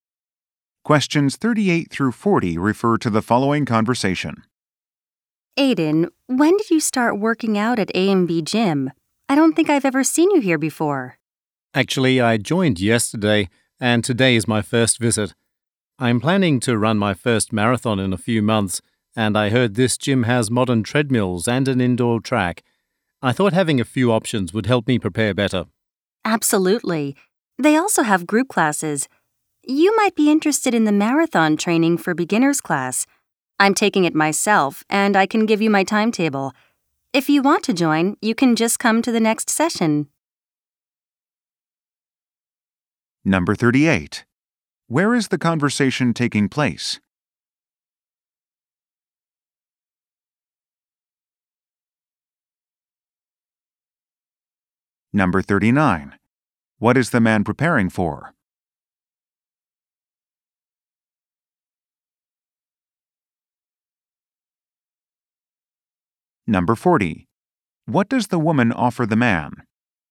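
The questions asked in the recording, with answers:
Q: Where is the conversation taking place?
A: At a gym

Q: What is the man preparing for?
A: A marathon

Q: What does the woman offer the man?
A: Her class timetable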